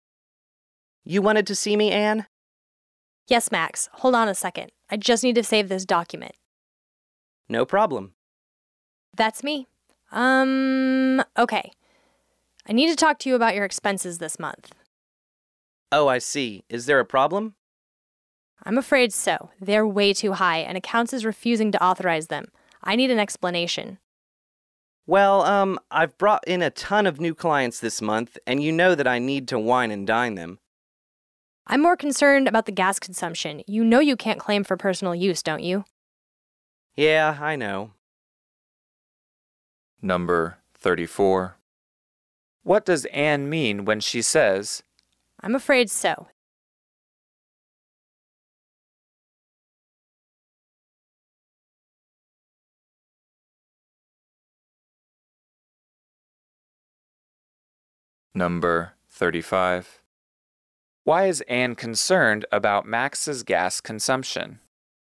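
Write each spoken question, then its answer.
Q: What does Anne mean when she says, I'm afraid so.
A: There is a problem with Max's expenses

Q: Why is Anne concerned about Max's gas consumption?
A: She suspects he is claiming for personal use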